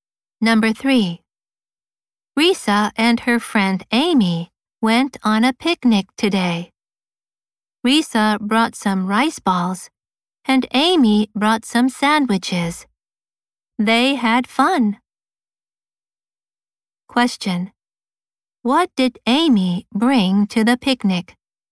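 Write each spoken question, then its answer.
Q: What did Amy bring to the picnic?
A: Some sandwiches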